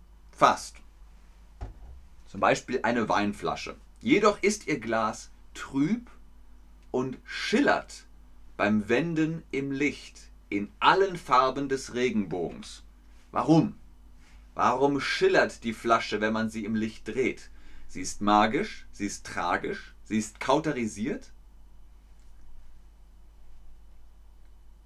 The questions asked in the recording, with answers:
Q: Warum? Warum schillert die Flasche, wenn man sie im Licht dreht?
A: Korrekt. Sie ist magisch.